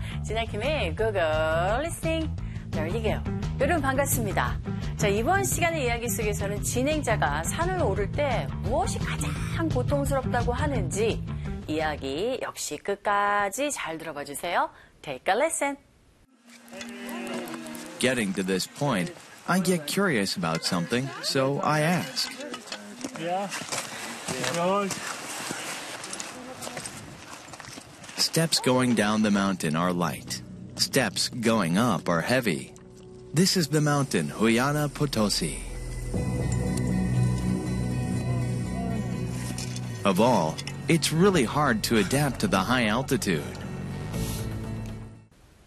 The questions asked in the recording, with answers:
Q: 진행자가 산을 오를 때 무엇이 가장 고통스럽다고 하는지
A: 바로 높은 고도에 적응하는 것이 가장 고통스러운 모습이었고